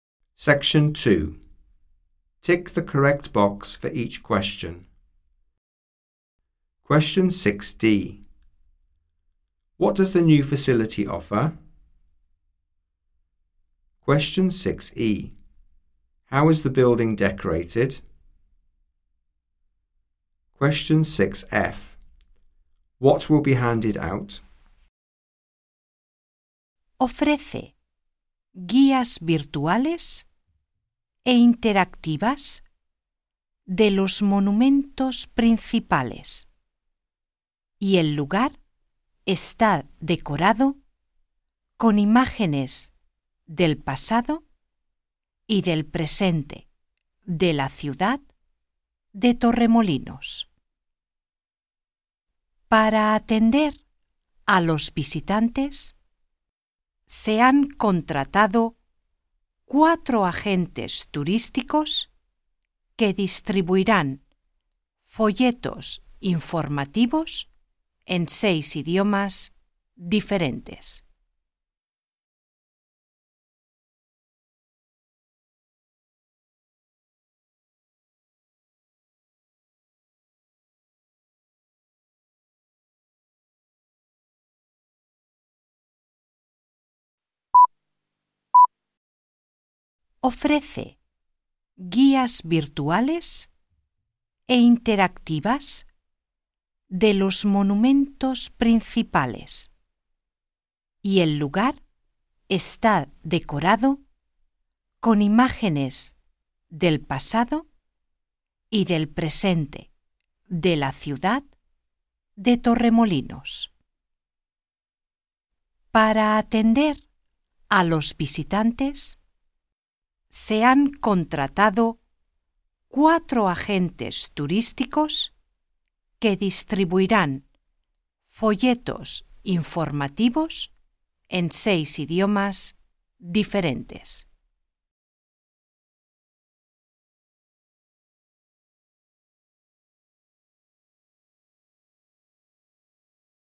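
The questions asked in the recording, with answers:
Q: What does the new facility offer?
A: Virtual, interactive guides to the main monuments

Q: How is the building decorated?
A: With images of the town's past and present

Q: What will be handed out?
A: Information leaflets in 6 languages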